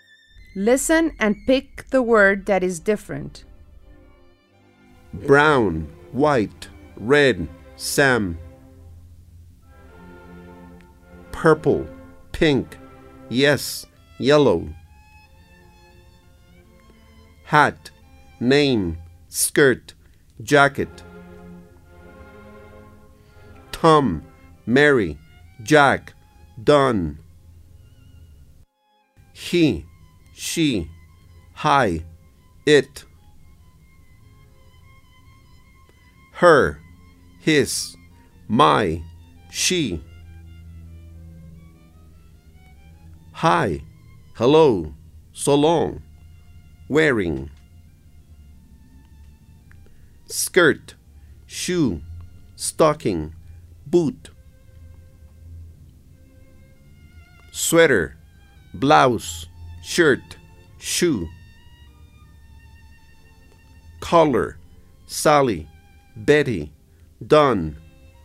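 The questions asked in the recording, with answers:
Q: Brown, white, red, Sam.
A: Sam

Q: Purple, pink, yes, yellow.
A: yes

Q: Hat, name, skirt, jacket.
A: name

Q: Tom, Mary, Jack, Don.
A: Mary

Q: He, she, hi, it.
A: hi

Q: Her, his, my, she.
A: she

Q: Hi, hello, so long, wearing.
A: wearing

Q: Sweater, blouse, shirt, shoe.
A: shoe

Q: Collar, Sally, Betty, Don.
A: collar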